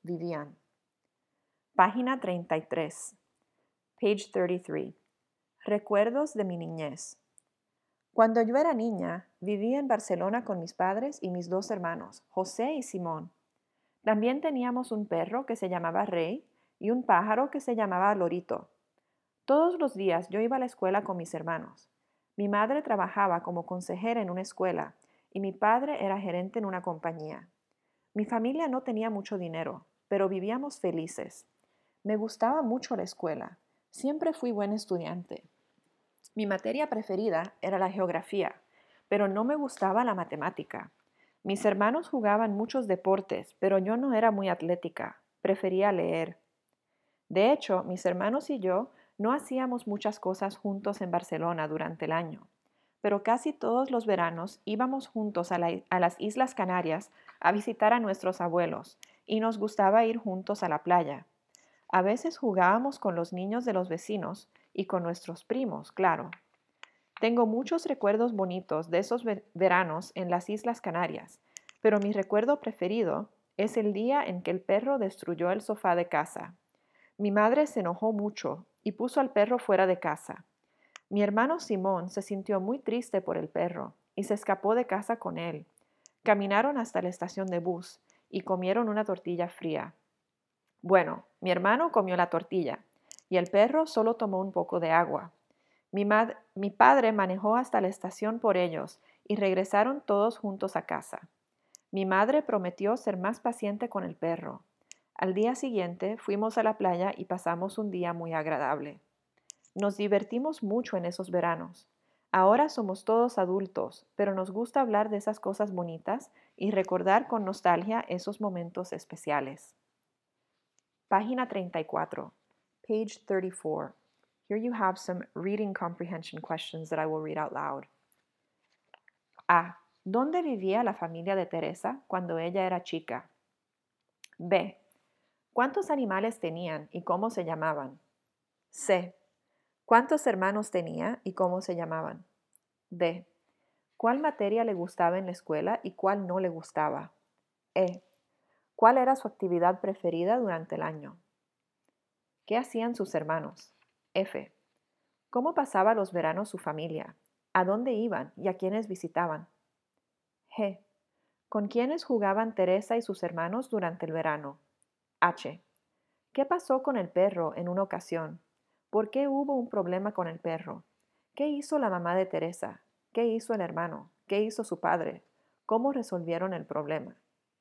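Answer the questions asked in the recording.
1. En Barcelona
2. Dos: un perro, Rey, y un pájaro, Lorito
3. Dos: José y Simón
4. Le gustaba la geografía; no le gustaba la matemática
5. Leer
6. Jugaban muchos deportes
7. Iban juntos a las Islas Canarias y a la playa
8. A las Islas Canarias; a sus abuelos
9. Con los niños de los vecinos y con sus primos
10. Destruyó el sofá de casa
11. Porque destruyó el sofá
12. Se enojó y puso al perro fuera de casa
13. Se escapó de casa con el perro a la estación de bus
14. Manejó hasta la estación por ellos
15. Regresaron juntos a casa y la madre prometió ser más paciente con el perro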